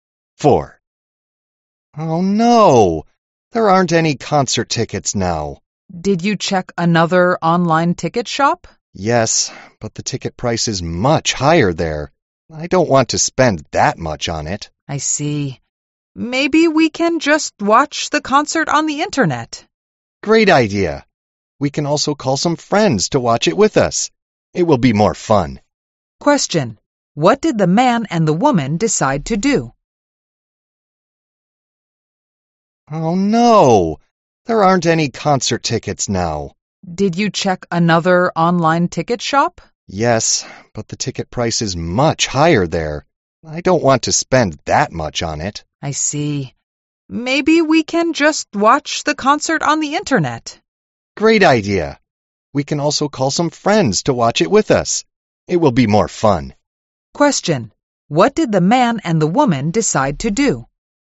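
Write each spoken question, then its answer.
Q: Question. What did the man and the woman decide to do?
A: Watch the concert on the internet with some friends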